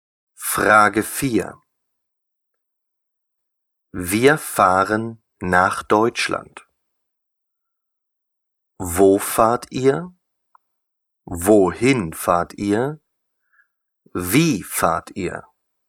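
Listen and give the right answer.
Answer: Wohin fahrt ihr?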